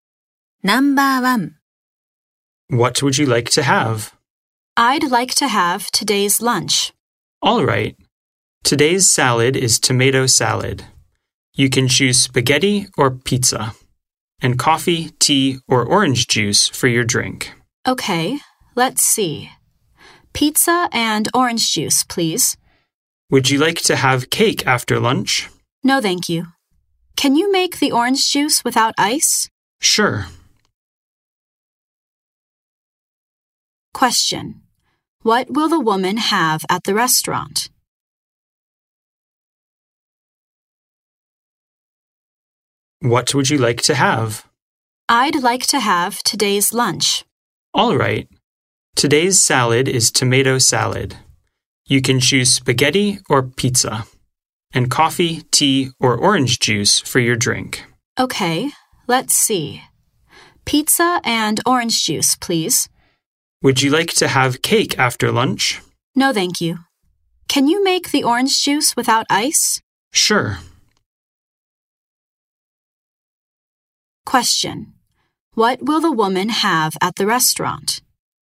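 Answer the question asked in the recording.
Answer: Today's lunch: tomato salad, pizza and orange juice without ice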